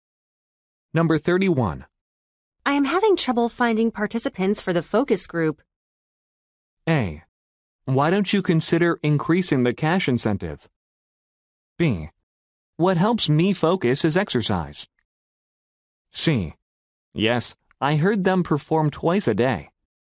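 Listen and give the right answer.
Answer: A: Why don't you consider increasing the cash incentive?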